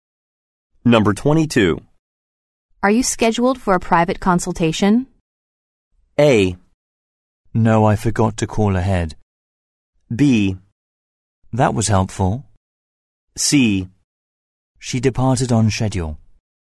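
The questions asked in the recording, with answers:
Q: Are you scheduled for a private consultation?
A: A: No, I forgot to call ahead.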